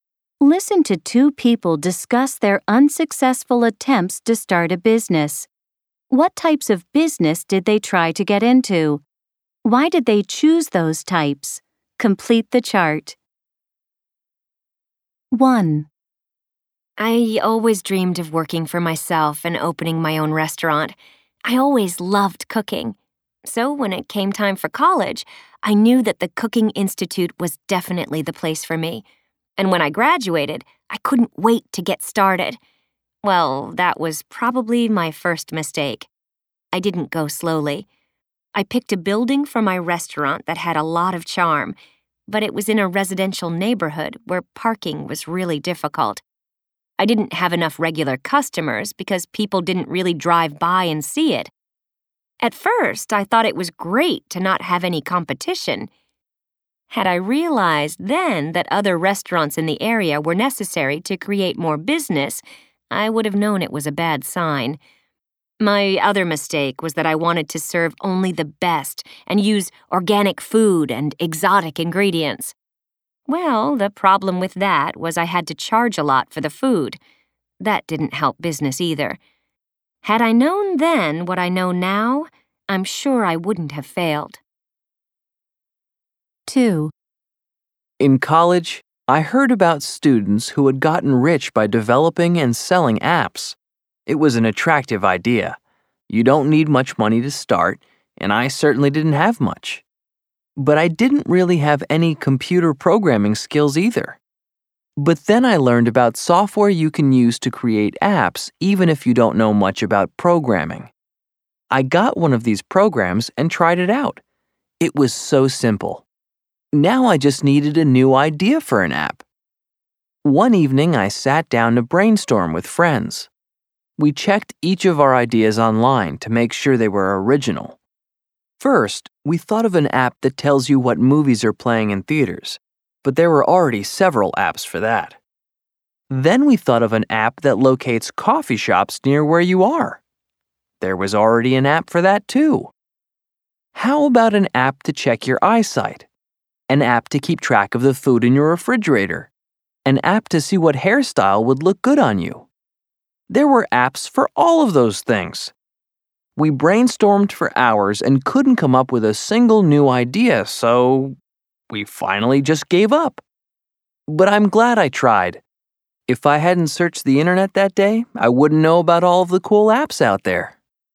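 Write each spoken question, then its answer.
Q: What types of business did they try to get into?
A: Speaker 1: a restaurant; Speaker 2: developing and selling apps

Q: Why did they choose those types?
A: Speaker 1 always loved cooking and dreamed of working for herself; Speaker 2 heard students got rich selling apps, and you don't need much money to start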